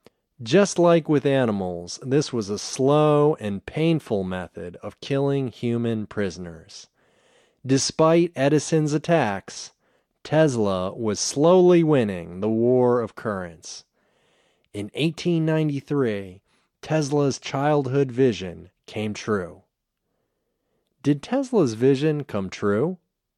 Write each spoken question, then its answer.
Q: Did Tesla's vision come true?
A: Yes, Tesla's vision came true.